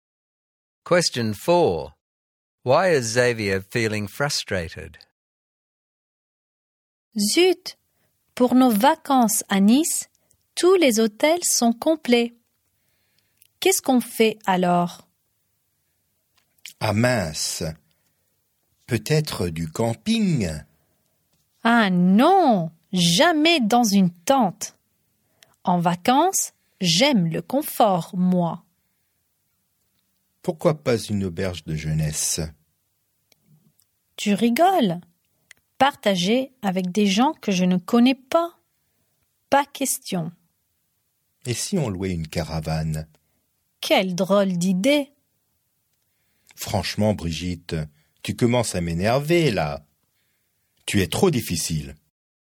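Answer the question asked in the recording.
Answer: Brigitte rejects every accommodation suggestion (camping, youth hostel, caravan) because the hotels in Nice are full; she is too difficult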